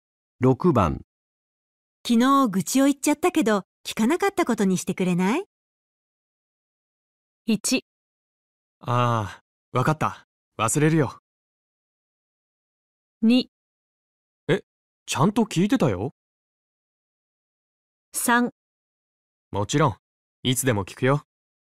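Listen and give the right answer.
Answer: 1: ああ、わかった。忘れるよ。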